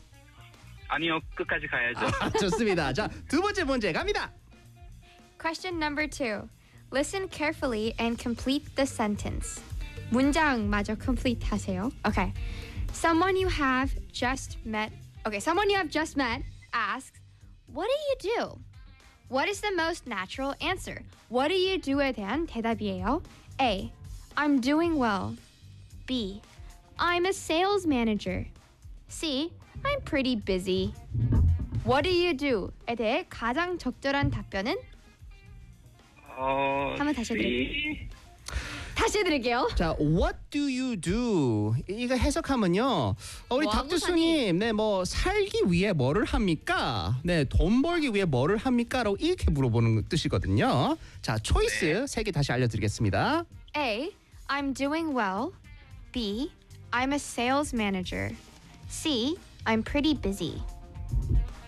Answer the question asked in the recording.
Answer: 무슨 일 하세요? 라고 물어본 질문이니까 I'm a sales manager.